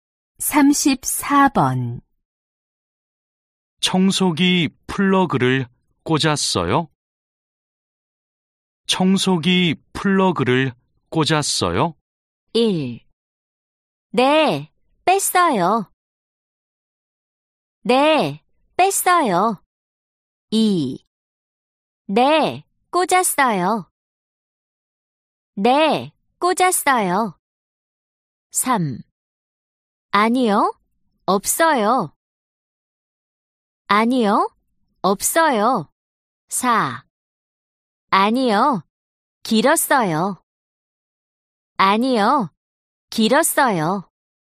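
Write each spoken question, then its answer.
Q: 청소기 플러그를 꽂았어요?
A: 2: 네, 꽂았어요.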